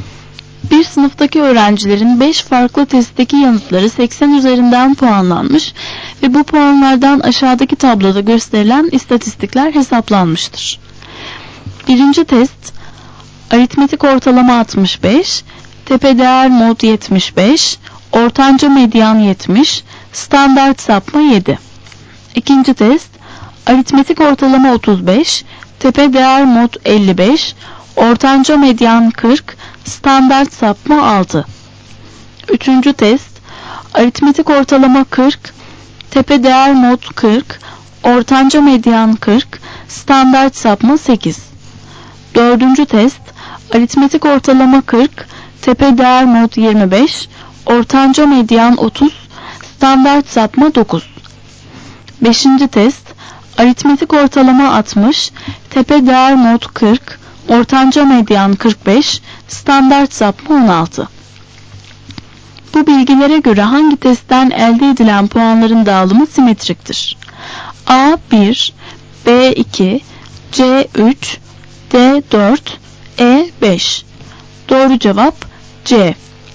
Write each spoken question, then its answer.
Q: Bu bilgilere göre hangi testten elde edilen puanların dağılımı simetriktir?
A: Doğru cevap C.